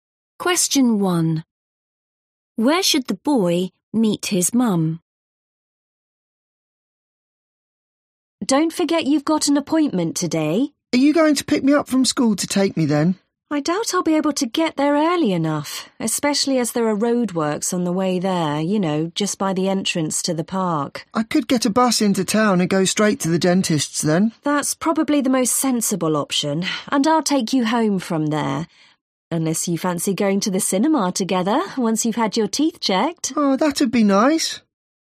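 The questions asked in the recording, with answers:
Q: Where should the boy meet his mum?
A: At the dentist's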